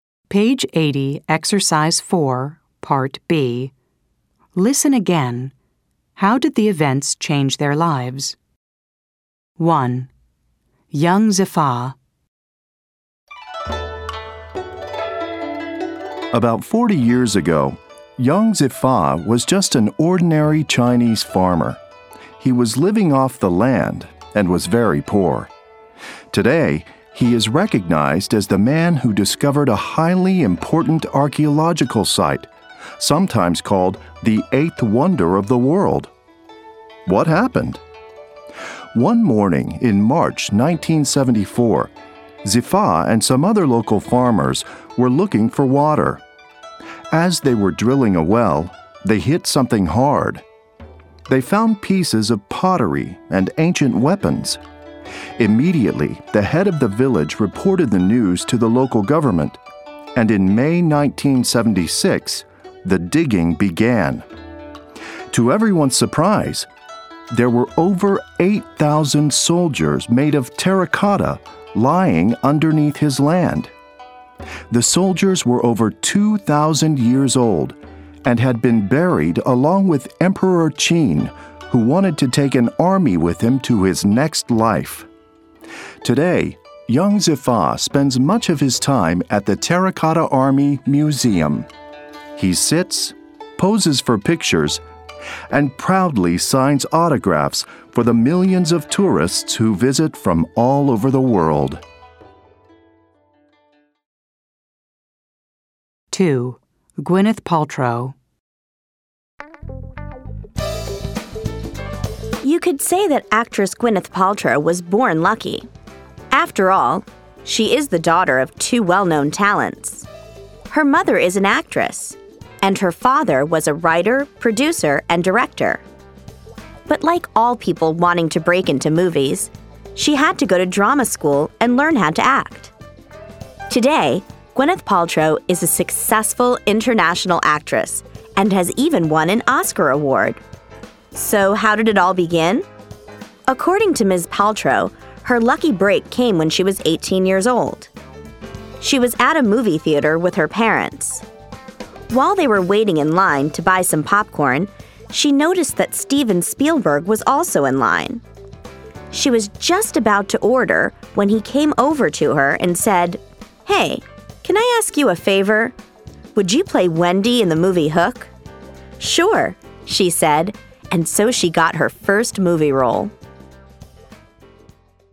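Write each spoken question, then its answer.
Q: How did the events change their lives?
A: Young Zifa went from a poor ordinary farmer to being recognized as the man who discovered the Terracotta Army; he now signs autographs at the museum

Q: How did the events change their lives?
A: Gwyneth Paltrow met Steven Spielberg in a popcorn line, got her first movie role (Wendy in Hook), and became a successful Oscar-winning actress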